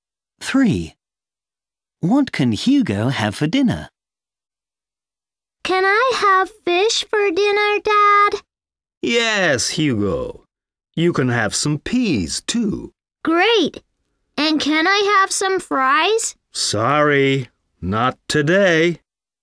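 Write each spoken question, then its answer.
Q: What can Hugo have for dinner?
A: fish and peas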